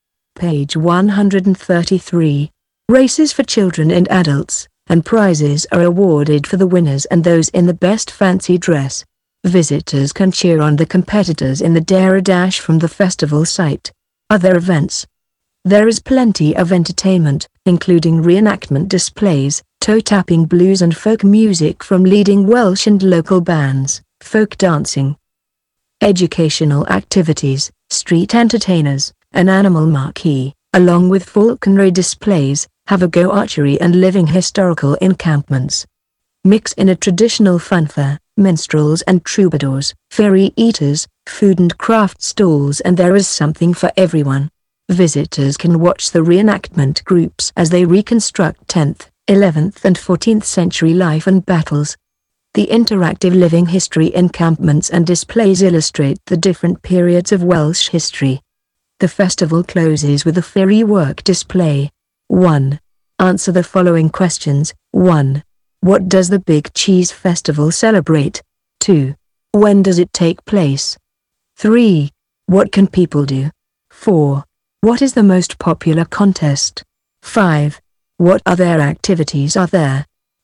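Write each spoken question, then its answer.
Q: What other activities are there?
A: Reenactment displays, blues and folk music, folk dancing, educational activities, street entertainers, an animal marquee, falconry displays, archery, living history encampments, a funfair, food and craft stalls, and a firework display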